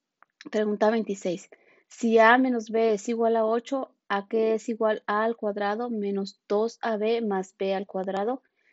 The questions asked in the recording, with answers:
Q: Si A menos B es igual a 8, a que es igual a al cuadrado menos 2ab más b al cuadrado.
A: Y la respuesta correcta es la de 64.